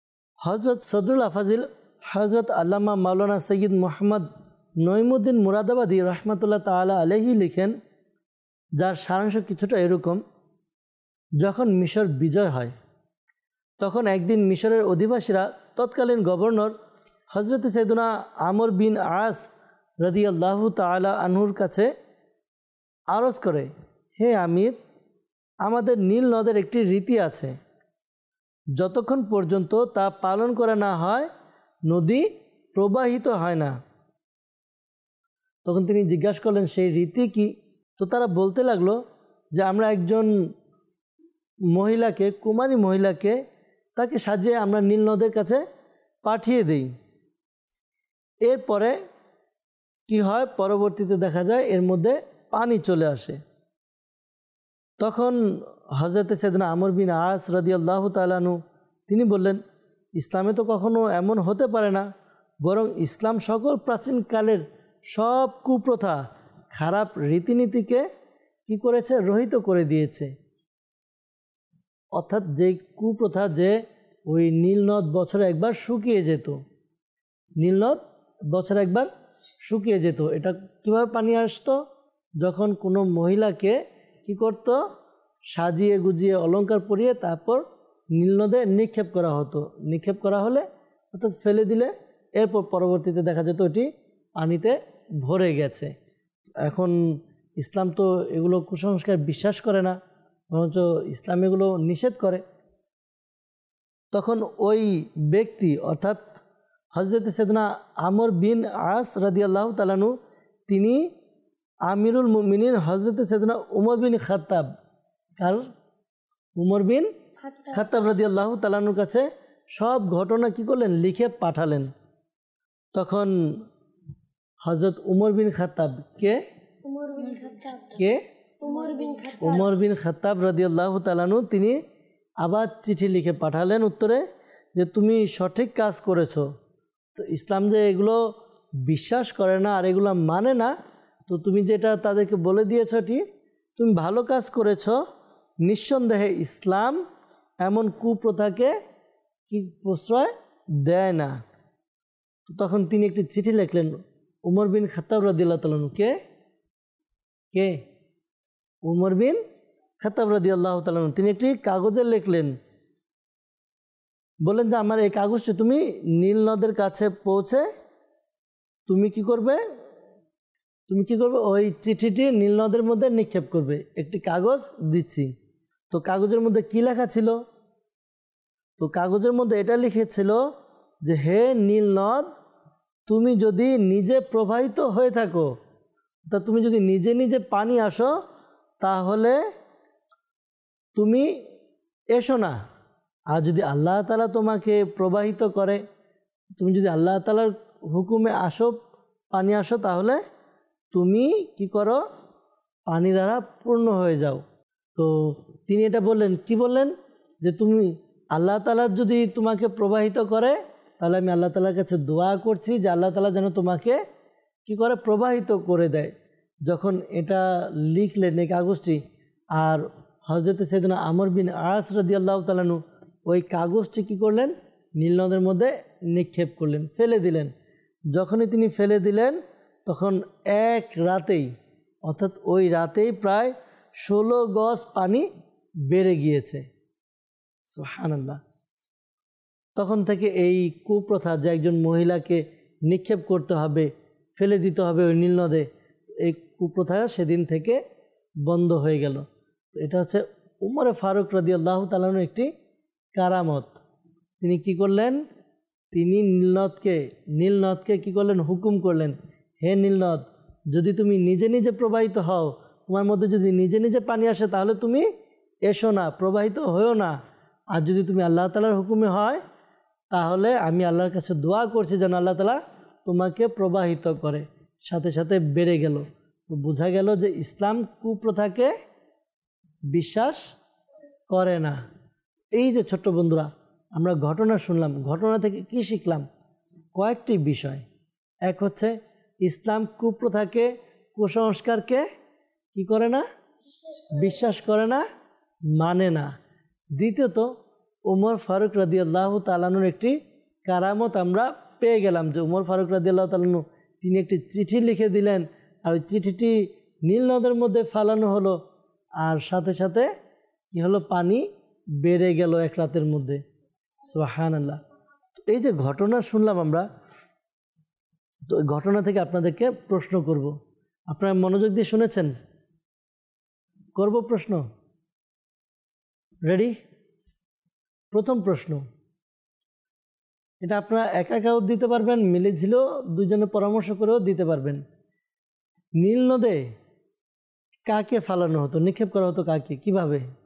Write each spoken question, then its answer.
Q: নীলনদে কাকে ফালানো হতো, নিক্ষেপ করা হতো কাকে, কিভাবে?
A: নীলনদের মধ্যে একজন মহিলাকে সাজিয়ে গুজিয়ে অলংকার পরিয়ে নিক্ষেপ করা হতো।